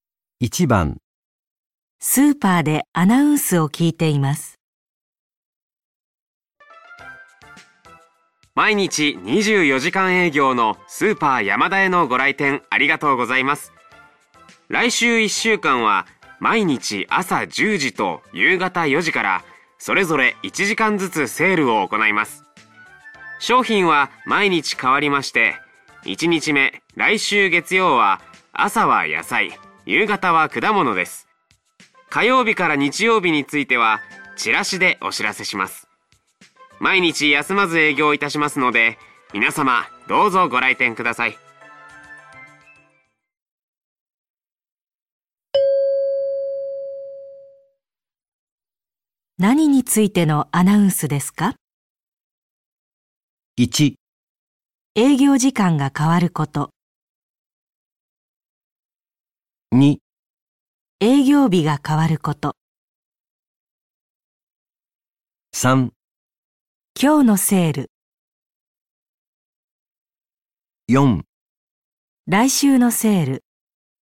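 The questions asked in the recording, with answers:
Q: 何についてのアナウンスですか?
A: 4: 来週のセール。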